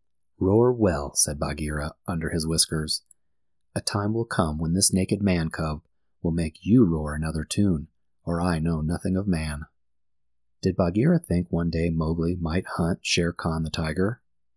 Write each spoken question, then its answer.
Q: Did Bagheera think one day Mowgli might hunt Shere Khan the tiger?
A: Yes, one day Bagheera thought Mowgli might be the hunter, and that would change Shere Khan's roar.